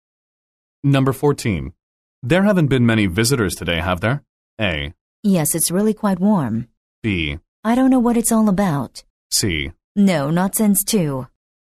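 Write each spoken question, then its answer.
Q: There haven't been many visitors today, have there?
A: C: No, not since 2.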